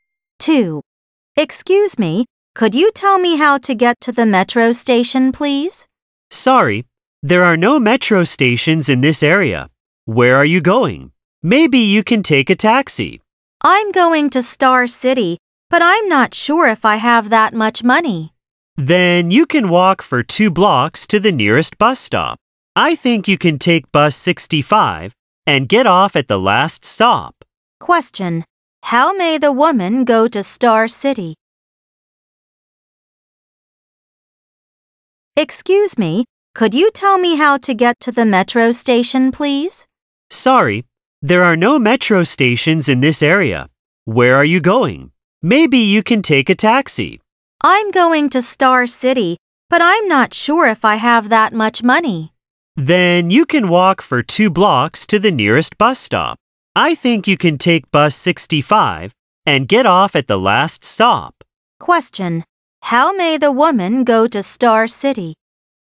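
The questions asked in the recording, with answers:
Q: How may the woman go to Star City?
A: By bus 65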